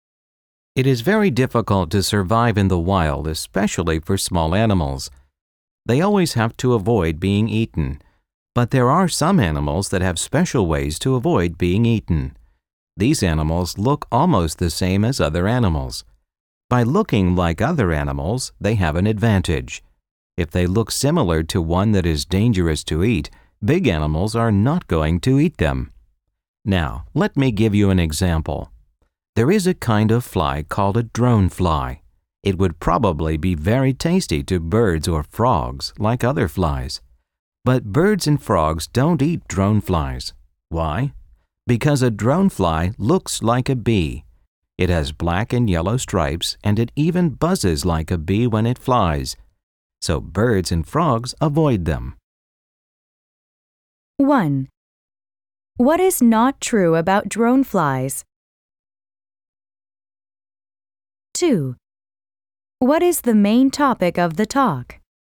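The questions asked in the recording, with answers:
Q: What is the main topic of the talk?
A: Some animals avoid being eaten by looking like dangerous animals, e.g. the drone fly looks like a bee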